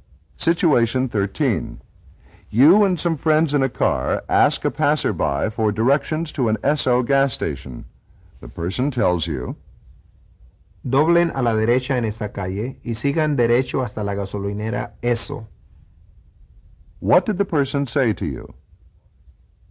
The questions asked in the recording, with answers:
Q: What did the person say to you?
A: He said, Turn right at that street and keep going straight ahead to the SO gas station.